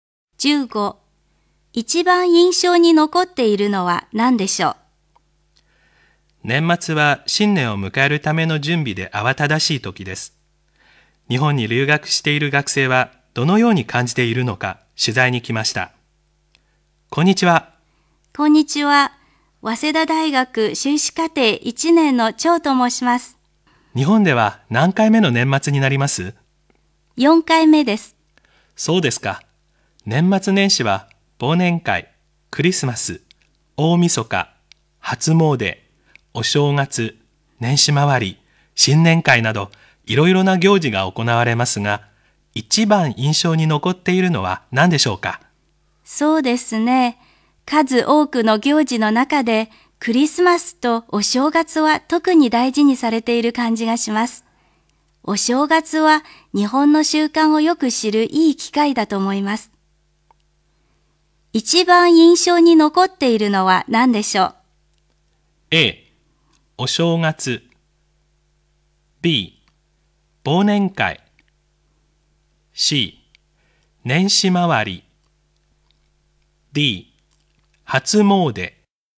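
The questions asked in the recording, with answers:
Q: 一番印象に残っているのは何でしょう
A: A: お正月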